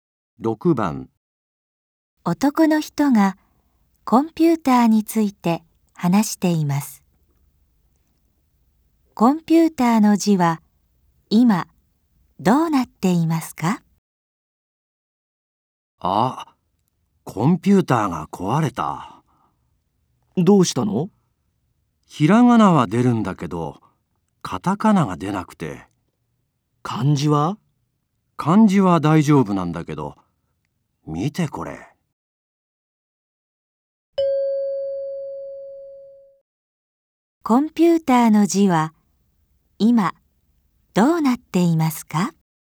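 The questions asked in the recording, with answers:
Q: コンピューターの字は今どうなっていますか?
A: ひらがなと漢字は出るが、カタカナが出ない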